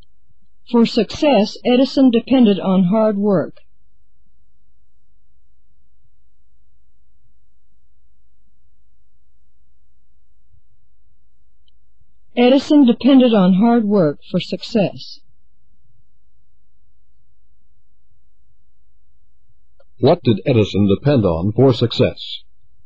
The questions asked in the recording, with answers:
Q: What did Edison depend on for success?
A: He depended on hard work.